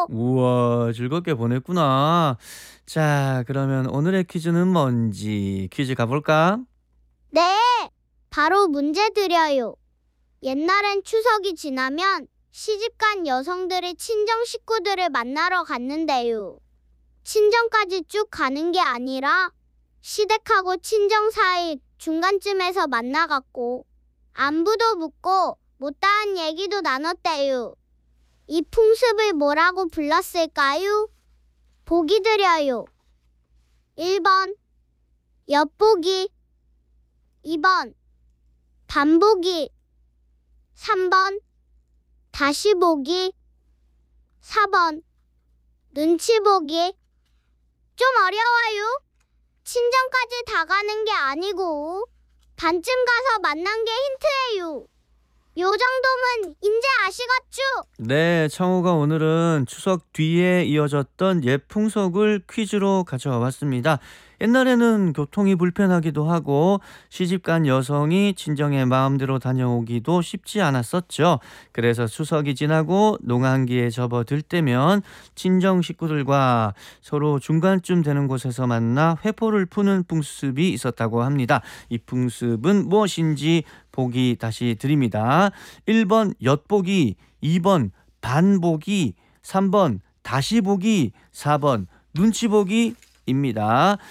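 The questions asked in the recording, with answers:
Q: 이 풍습은 무엇인지 보기 다시 드립니다. 1번 엿보기, 2번 반보기, 3번 다시보기, 4번 눈치보기 입니다.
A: 2번: 반보기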